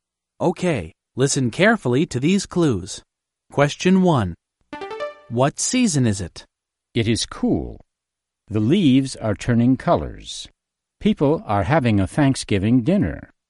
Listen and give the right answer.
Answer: Thanksgiving? Americans have Thanksgiving in the fall.